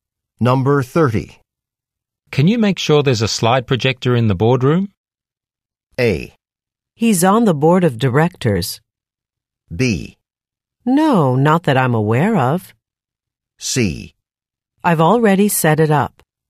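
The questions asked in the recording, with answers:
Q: Can you make sure there's a slide projector in the boardroom?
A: C: I've already set it up.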